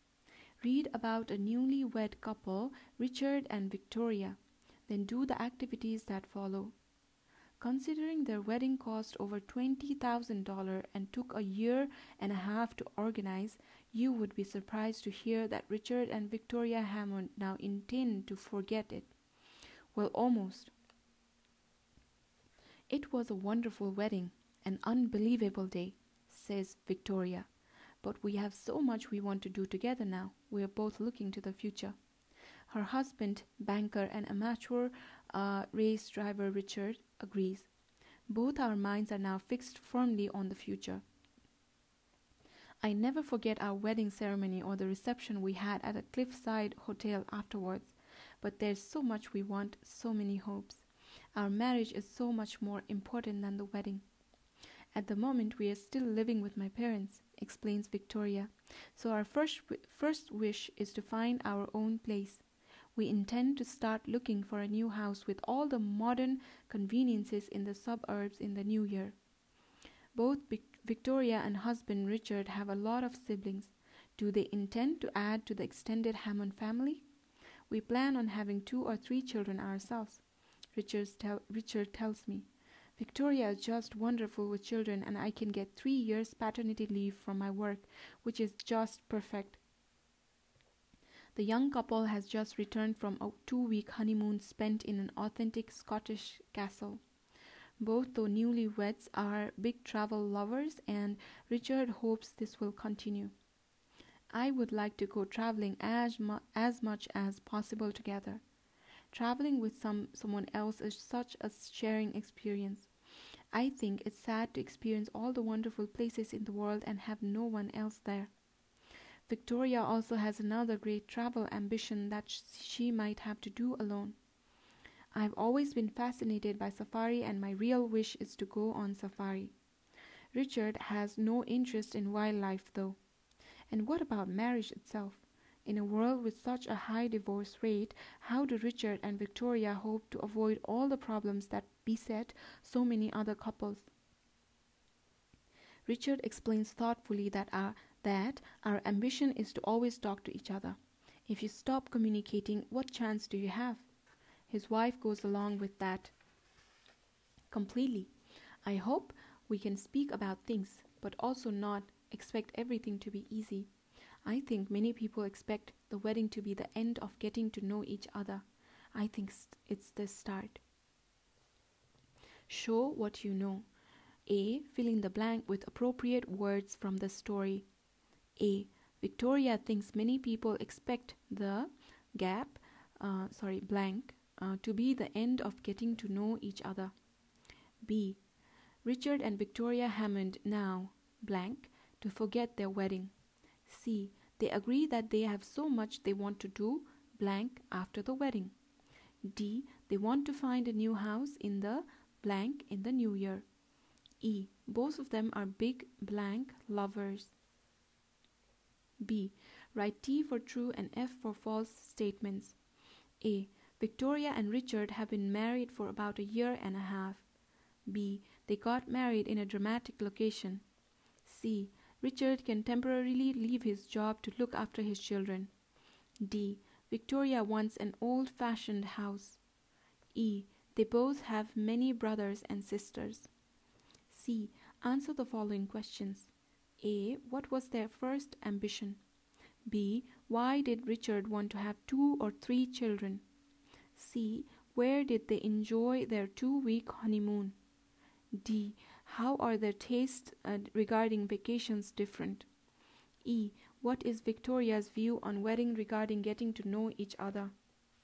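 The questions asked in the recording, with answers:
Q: Victoria and Richard have been married for about a year and a half.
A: False

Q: Richard can temporarily leave his job to look after his children.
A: True

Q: Victoria wants an old fashioned house.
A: False

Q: They both have many brothers and sisters.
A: True

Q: What was their first ambition?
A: To find their own place

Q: Where did they enjoy their two week honeymoon?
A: In an authentic Scottish castle

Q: How are their tastes uh, regarding vacations different?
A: Victoria wants to go on safari, but Richard has no interest in wildlife

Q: What is Victoria's view on wedding regarding getting to know each other?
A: It is the start, not the end, of getting to know each other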